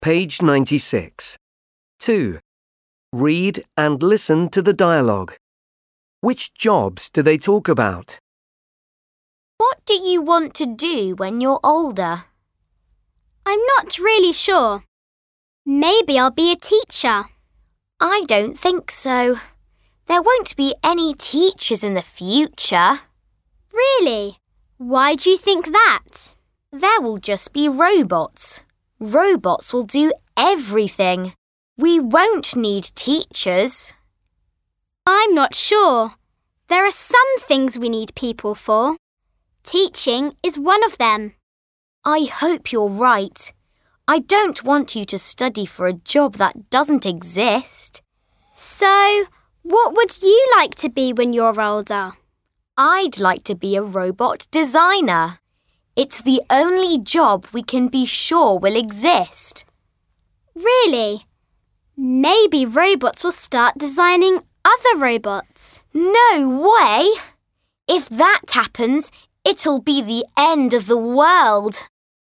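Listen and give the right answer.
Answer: Teacher and robot designer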